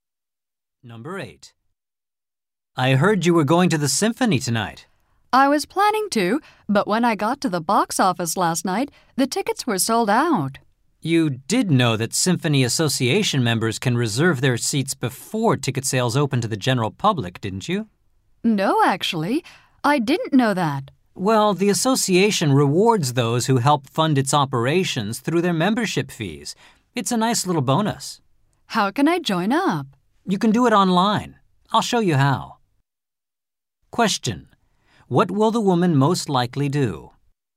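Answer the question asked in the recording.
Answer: Join the Symphony Association online.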